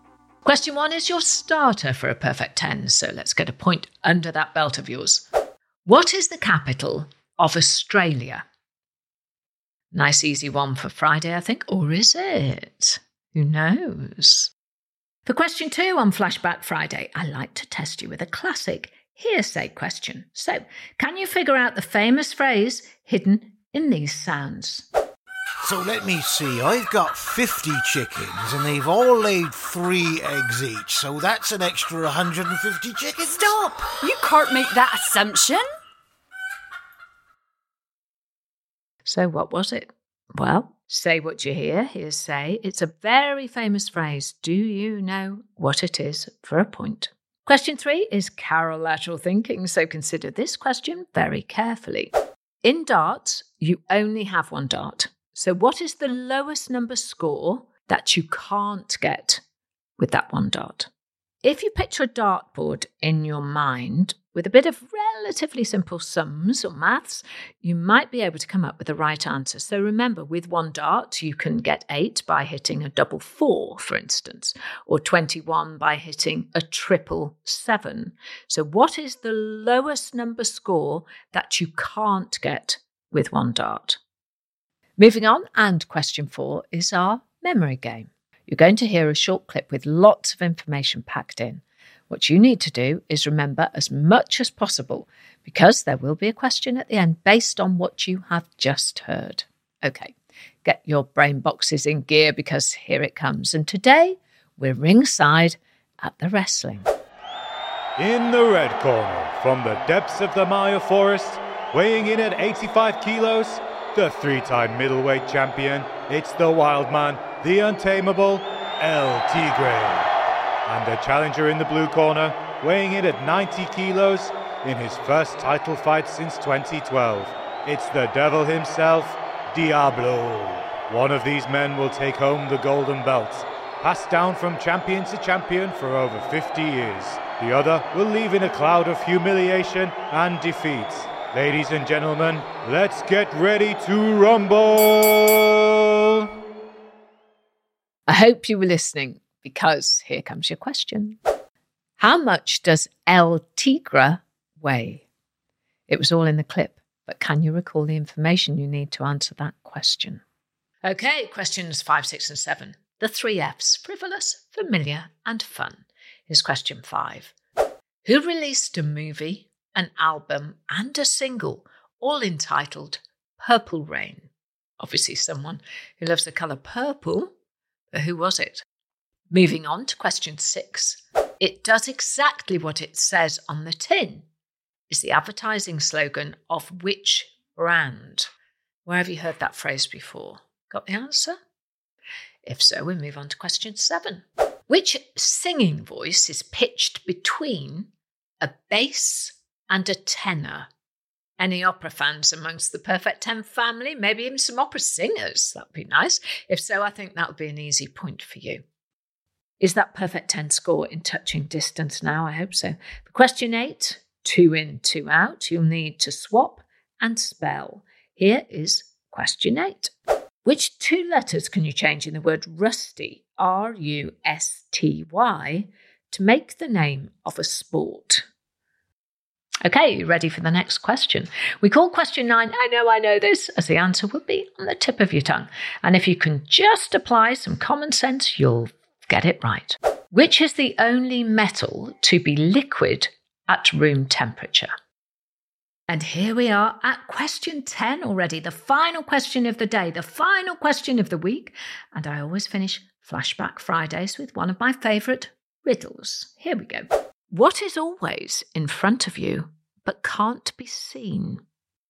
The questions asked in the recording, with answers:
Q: How much does El Tigre weigh?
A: And the answer in the clip was 85 kilograms.